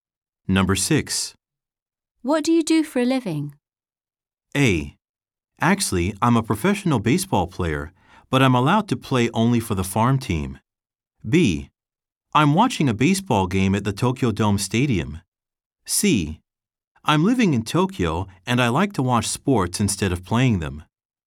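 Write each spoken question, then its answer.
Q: What do you do for a living?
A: A: Actually, I'm a professional baseball player, but I'm allowed to play only for the farm team.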